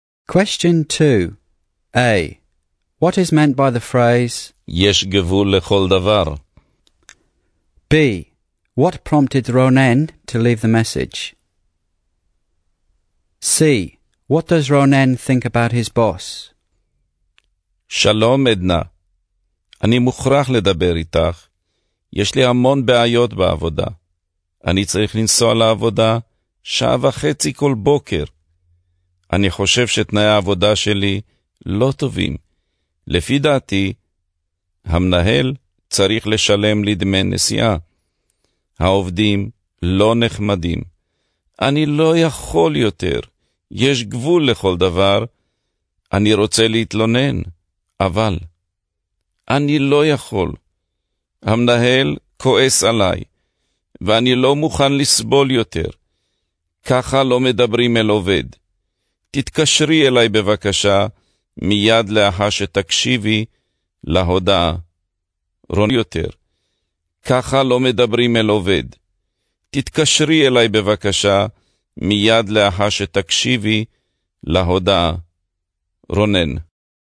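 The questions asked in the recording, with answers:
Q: What is meant by the phrase, יש גבול לכל דבר?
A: There is a limit to everything: he can't put up with it anymore

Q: What prompted Ronen to leave the message?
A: His many problems at work: a long commute, poor work conditions, unpleasant coworkers and an angry boss

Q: What does Ronen think about his boss?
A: The boss is angry at him, speaks to him improperly, and should pay his travel costs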